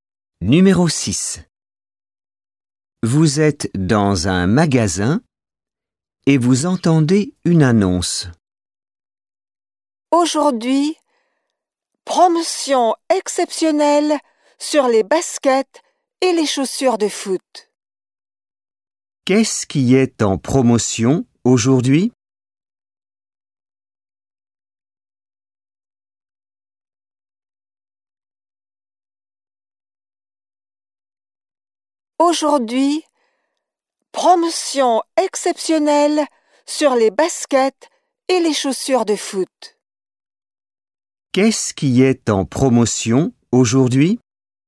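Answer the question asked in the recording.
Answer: Les baskets et les chaussures de foot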